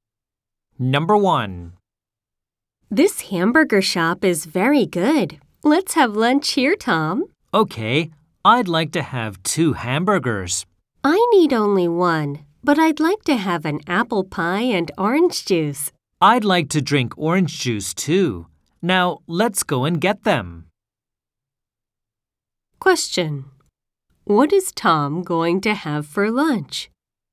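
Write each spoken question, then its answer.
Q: What is Tom going to have for lunch?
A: Two hamburgers and orange juice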